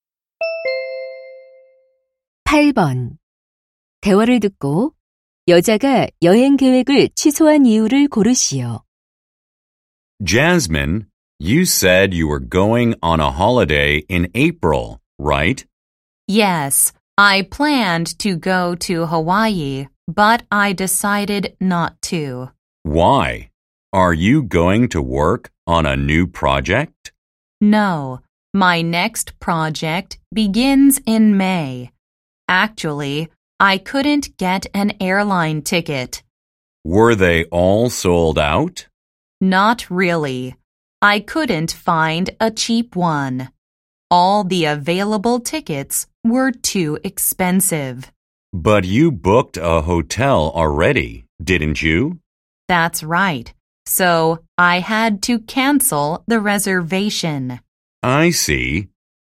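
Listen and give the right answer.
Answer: 저렴한 항공권을 구하지 못해서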